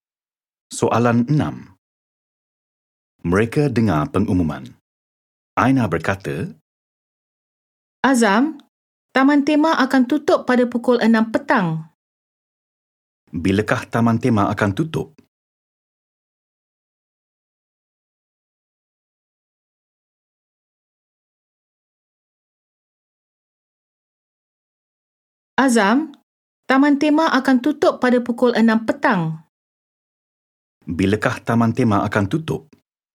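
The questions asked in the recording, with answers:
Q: Bilakah taman tema akan tutup?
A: Pukul 6 petang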